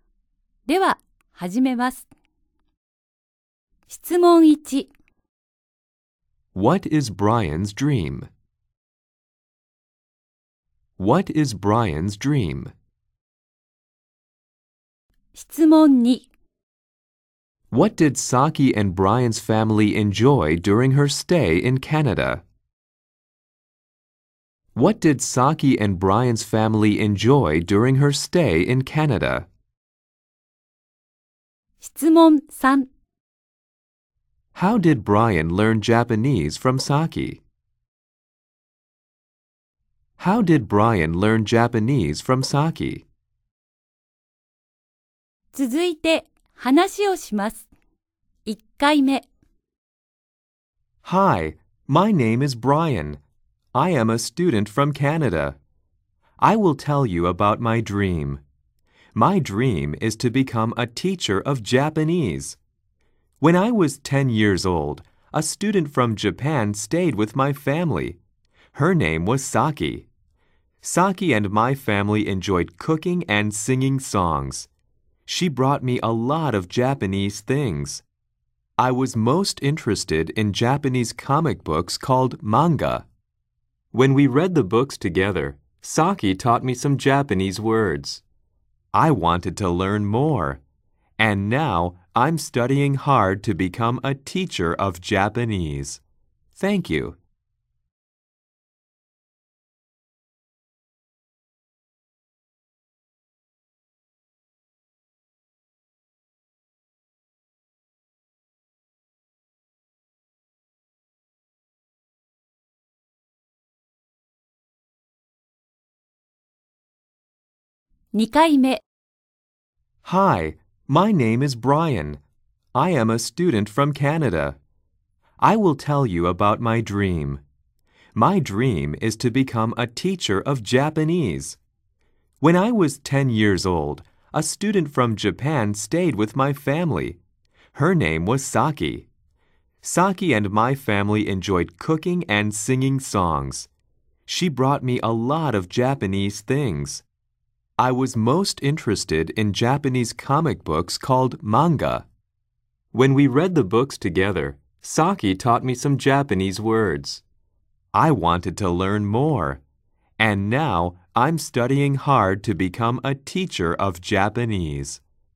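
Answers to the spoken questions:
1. To become a teacher of Japanese
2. Cooking and singing songs
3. By reading Japanese comic books (manga) together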